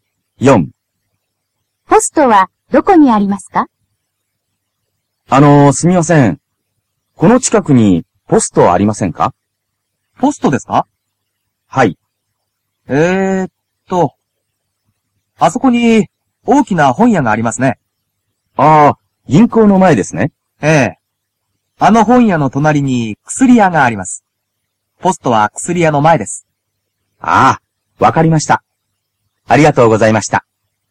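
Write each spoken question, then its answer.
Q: ポストはどこにありますか?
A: 本屋の隣の薬屋の前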